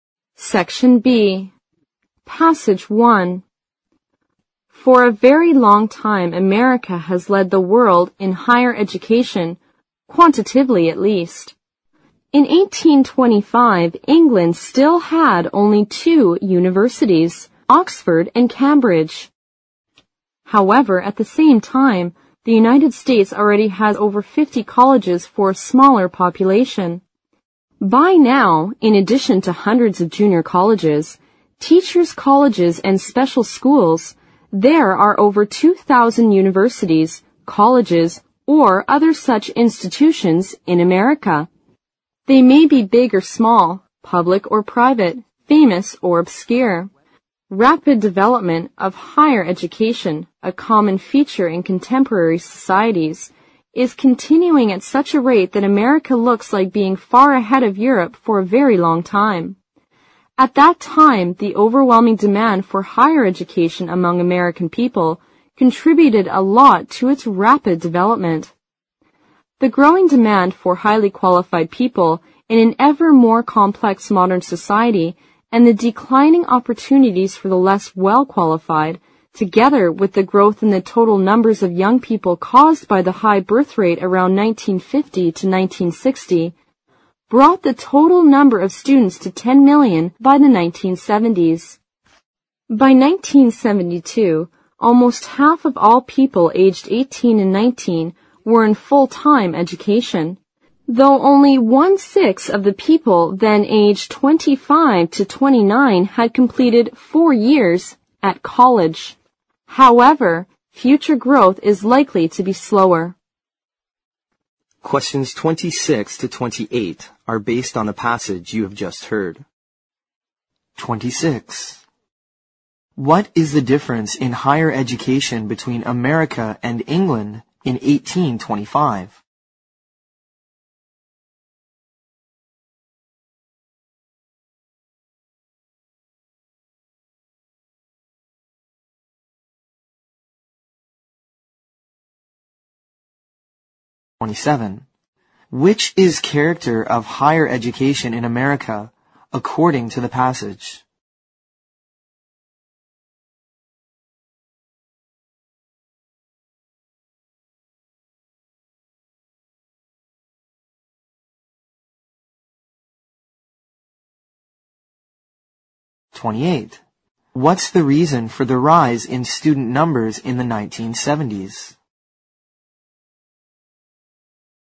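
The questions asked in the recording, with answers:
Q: What is the difference in higher education between America and England in 1825?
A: England had only two universities, but the US already had over 50 colleges.

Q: What's the reason for the rise in student numbers in the 1970s?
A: A modern society needed more highly qualified people, and the high birth rate from 1950 to 1960 meant more young people.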